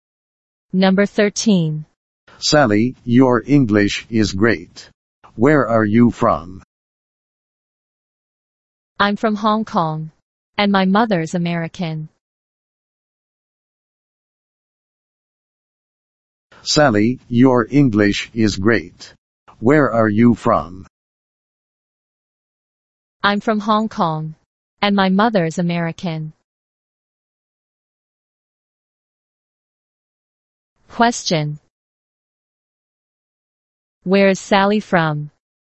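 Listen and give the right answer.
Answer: Hong Kong.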